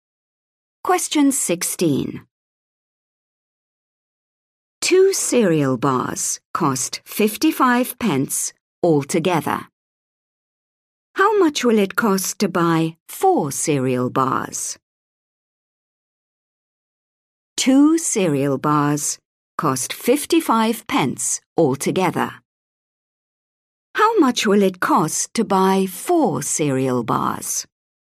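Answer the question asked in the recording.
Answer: 110 pence (£1.10)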